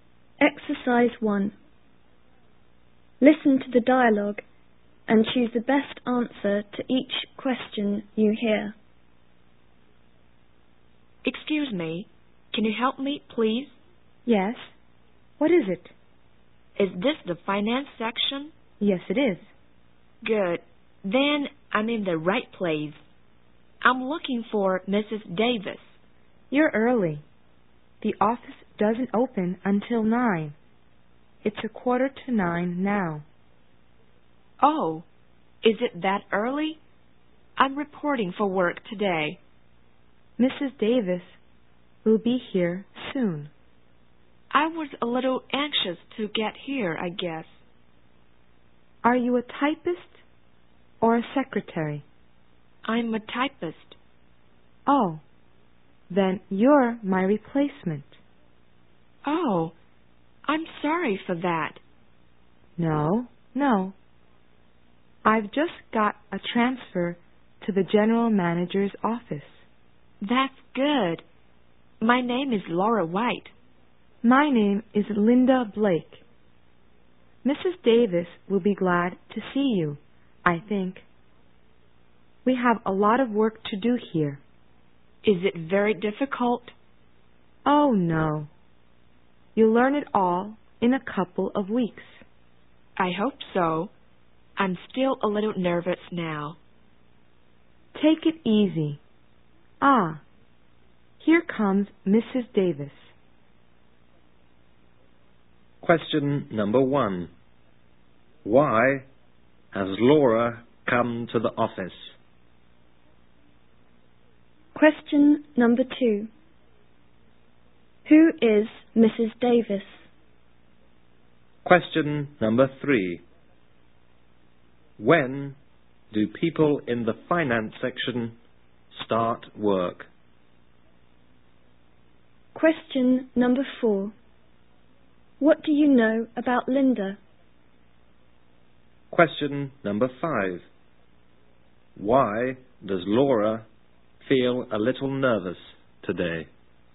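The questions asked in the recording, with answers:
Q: Why has Laura come to the office?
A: She is reporting for work as a new typist.

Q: When do people in the finance section start work?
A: At 9 o'clock.

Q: What do you know about Linda?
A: She is a typist who is being transferred to the general manager's office.

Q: Why does Laura feel a little nervous today?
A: It is her first day at a new job.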